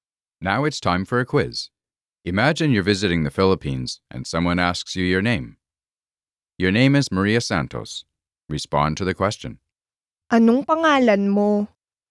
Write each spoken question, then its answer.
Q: Anong pangalan mo?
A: Ang pangalan ko ay Maria Santos.